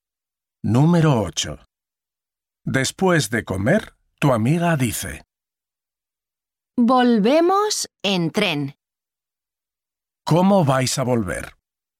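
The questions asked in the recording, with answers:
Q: ¿Cómo vais a volver?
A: En tren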